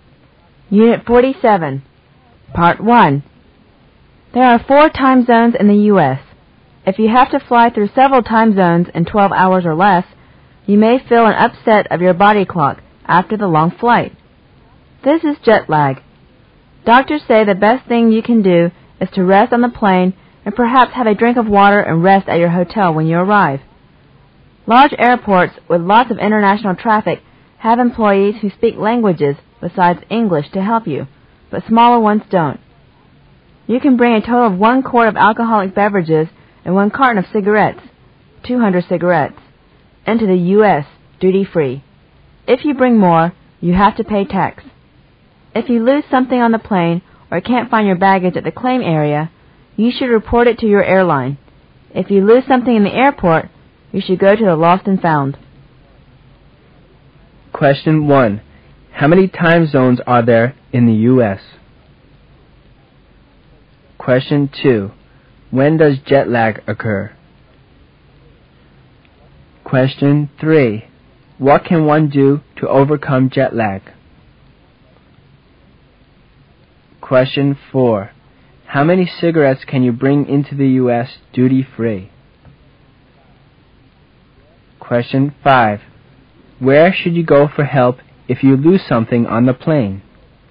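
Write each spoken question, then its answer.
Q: How many time zones are there in the U.S.?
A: Four

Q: When does jet lag occur?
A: After flying through several time zones in 12 hours or less

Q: What can one do to overcome jet lag?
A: Rest on the plane, drink water and rest at the hotel

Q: How many cigarettes can you bring into the U.S. duty-free?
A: 200

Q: Where should you go for help if you lose something on the plane?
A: Your airline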